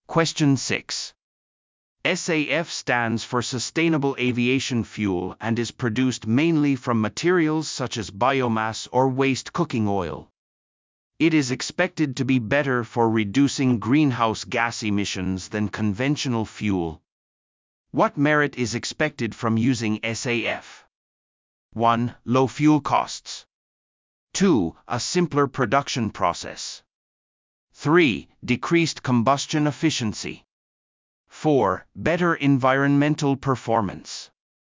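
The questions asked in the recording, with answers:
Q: What merit is expected from using SAF?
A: 4: Better environmental performance.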